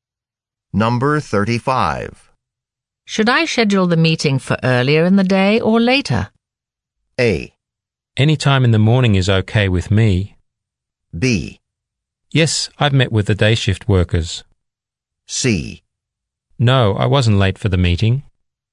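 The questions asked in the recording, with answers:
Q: Should I schedule the meeting for earlier in the day or later?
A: A: Any time in the morning is okay with me.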